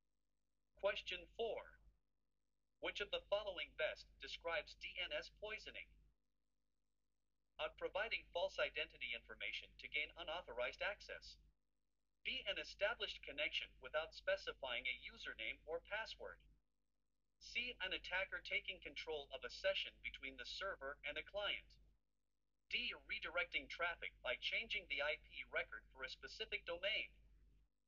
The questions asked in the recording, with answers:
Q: Which of the following best describes DNS poisoning?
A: The correct answer is D.